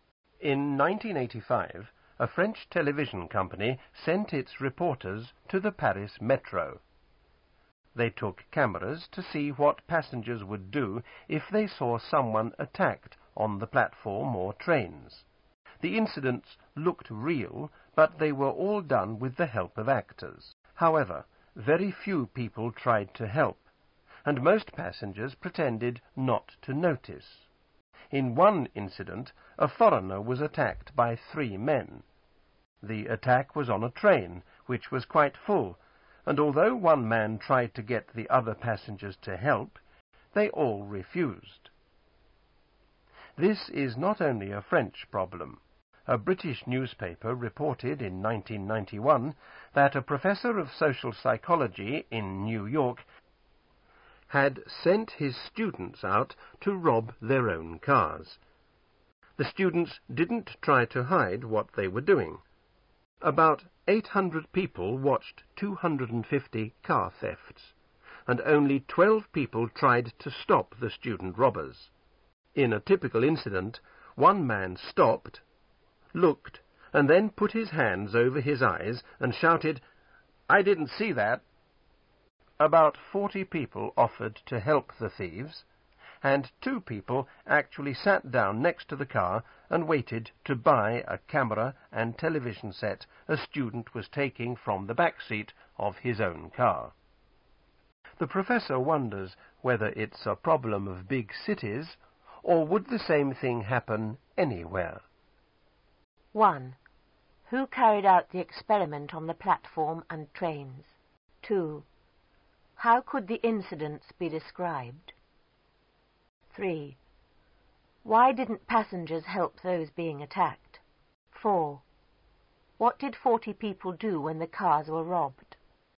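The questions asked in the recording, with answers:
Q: Who carried out the experiment on the platform and trains?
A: A French television company

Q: What did 40 people do when the cars were robbed?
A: They offered to help the thieves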